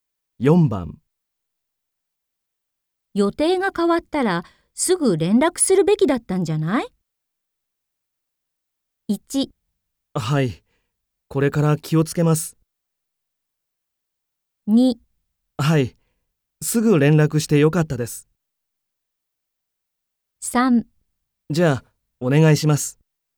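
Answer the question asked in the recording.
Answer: 1: はい、これから気をつけます。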